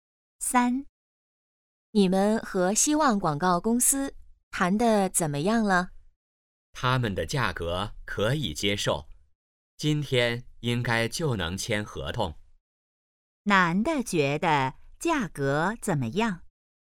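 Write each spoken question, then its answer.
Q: 男的觉得价格怎么样?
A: 可以接受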